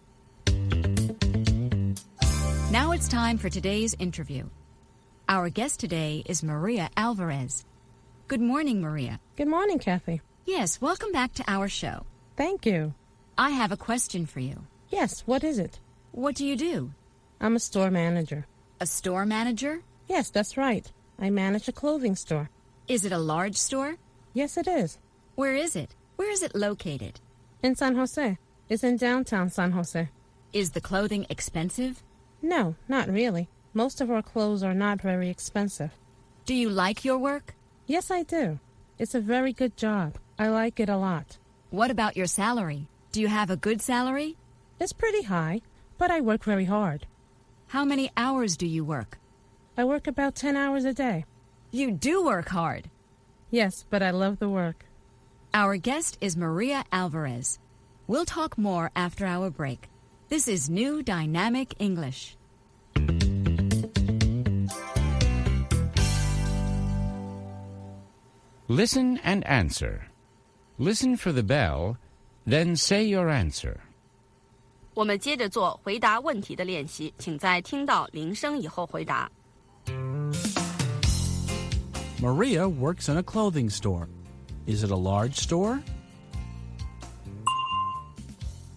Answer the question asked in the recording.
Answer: Yes, it is. It's large. The store sells clothing.